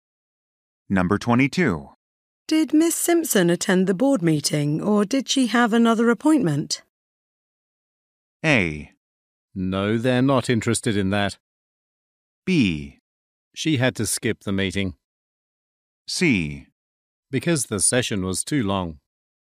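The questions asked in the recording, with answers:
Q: Did Miss Simpson attend the board meeting, or did she have another appointment?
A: B: She had to skip the meeting.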